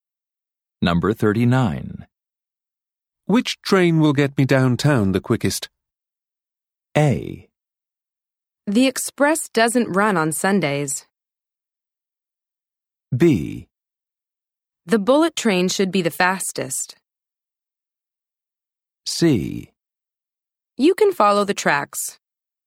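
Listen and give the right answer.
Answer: B: The bullet train should be the fastest.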